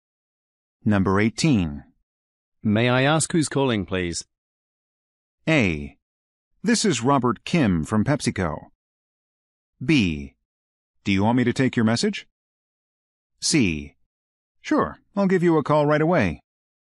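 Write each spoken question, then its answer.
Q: May I ask who's calling, please?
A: A: This is Robert Kim from PepsiCo.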